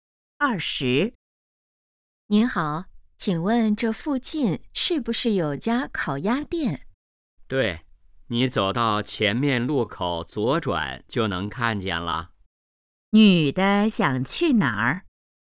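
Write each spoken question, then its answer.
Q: 女的想去哪儿?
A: 烤鸭店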